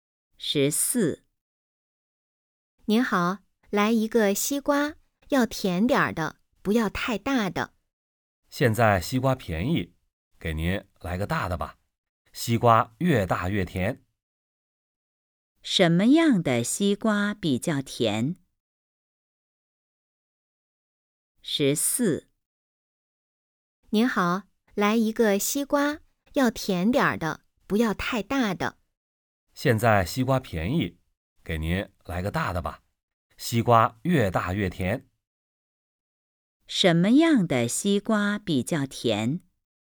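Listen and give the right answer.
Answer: 大的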